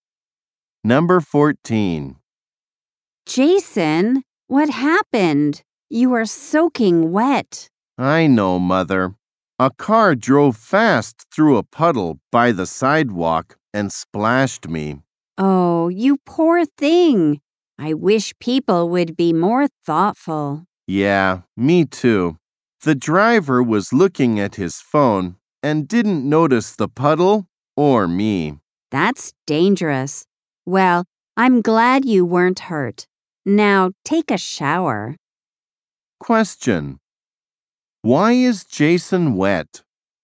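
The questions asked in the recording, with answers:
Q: Why is Jason wet?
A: A car splashed him driving through a puddle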